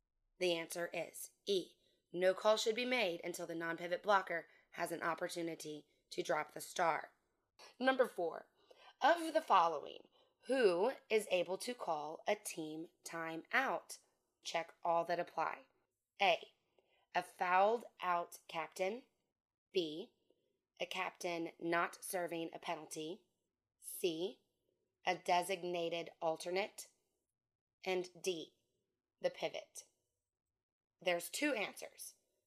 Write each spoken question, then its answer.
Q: of the following, who is able to call a team timeout?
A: A captain who is not serving a penalty and a designated alternate.